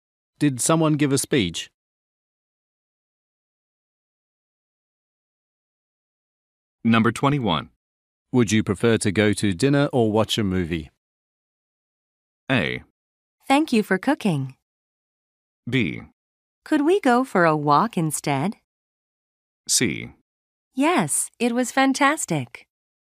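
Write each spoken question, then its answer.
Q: Would you prefer to go to dinner or watch a movie?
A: B: Could we go for a walk instead?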